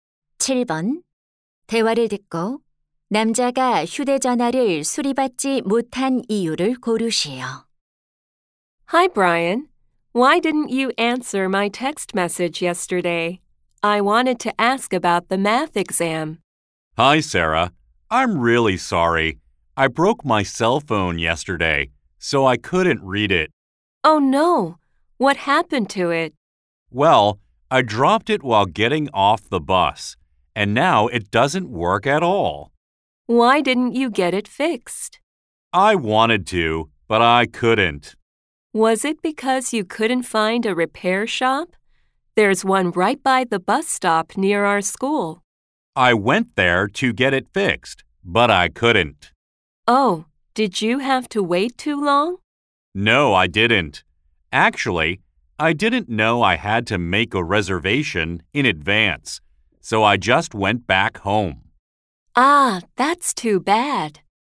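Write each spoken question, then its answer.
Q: 대화를 듣고 남자가 휴대전화를 수리받지 못한 이유를 고르세요.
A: 미리 예약하지 않아서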